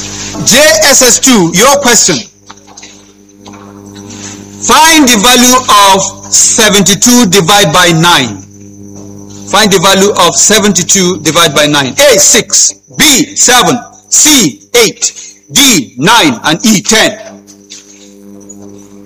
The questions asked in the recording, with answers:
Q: Find the value of 72 divided by 9.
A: the answer is 8.